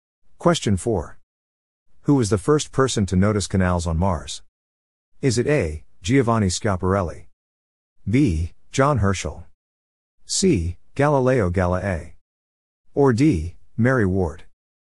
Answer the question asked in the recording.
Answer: The answer is A. Giovanni Schiaparelli.